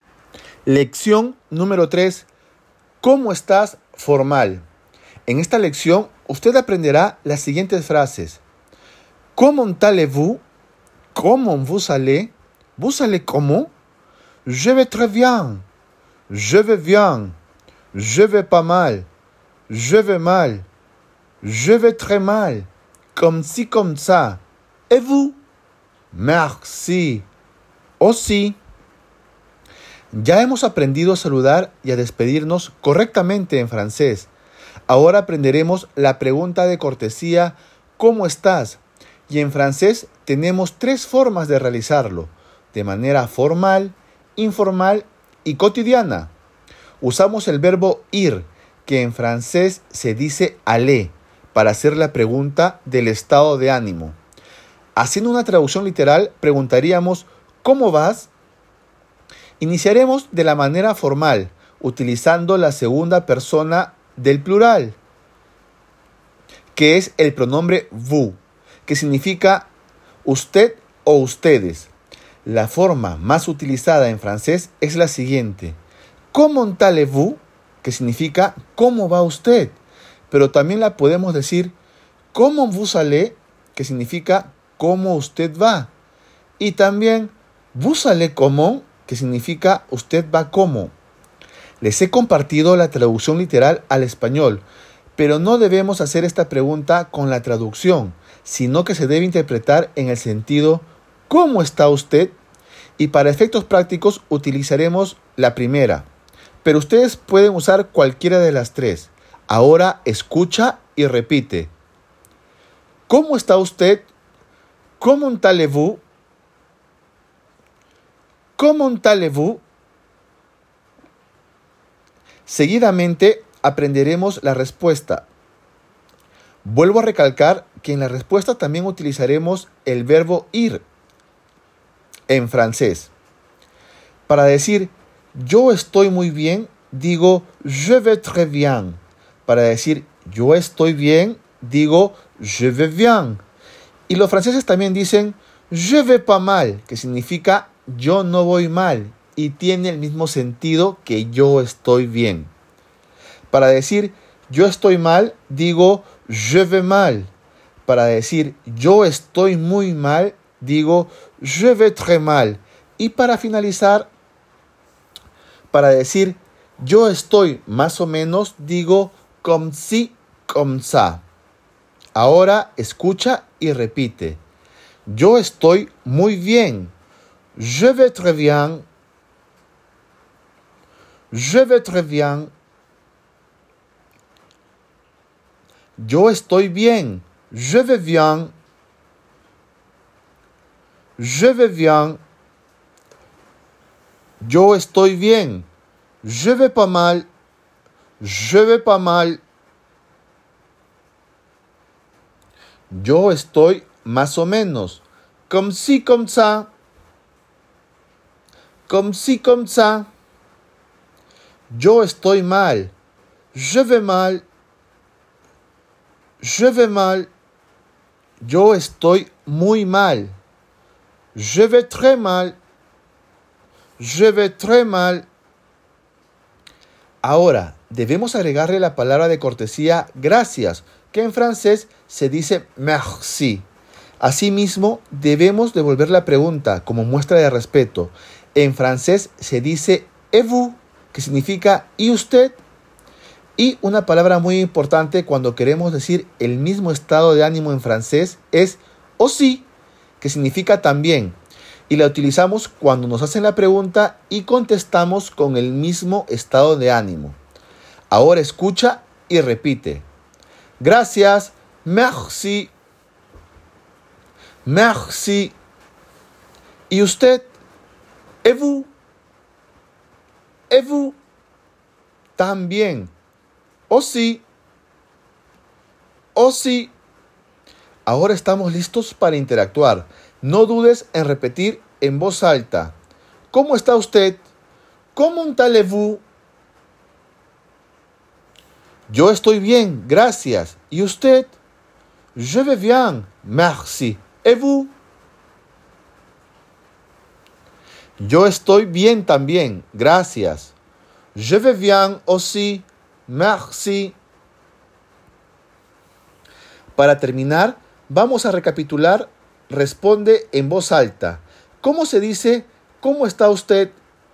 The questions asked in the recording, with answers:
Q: ¿Cómo se dice? ¿Cómo está usted?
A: ¿Cómo allez-vous?